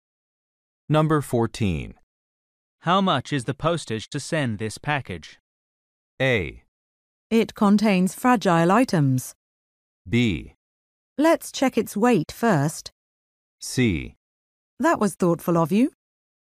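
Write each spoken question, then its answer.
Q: How much is the postage to send this package?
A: B: Let's check its weight first.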